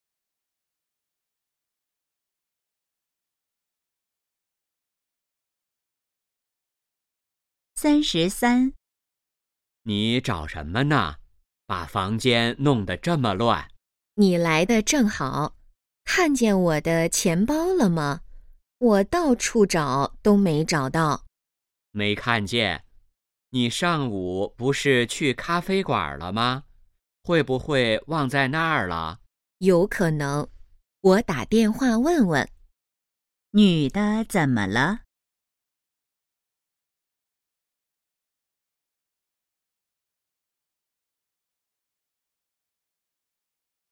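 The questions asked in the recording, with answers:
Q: 女的怎么了?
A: 钱包找不到了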